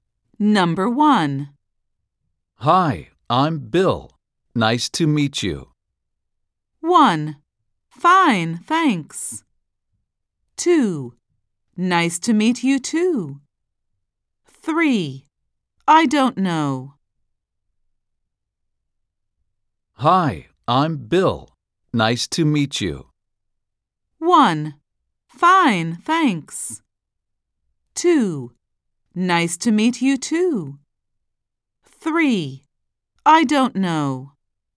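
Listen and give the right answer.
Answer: 2: Nice to meet you too.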